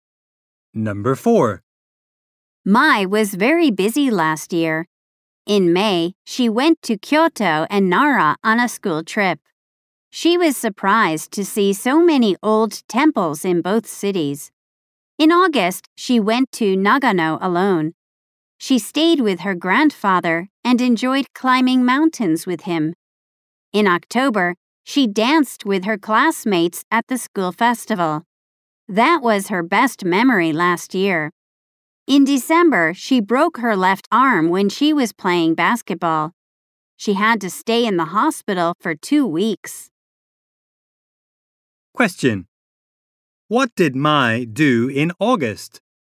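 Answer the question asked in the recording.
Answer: She went to Nagano alone and climbed mountains with her grandfather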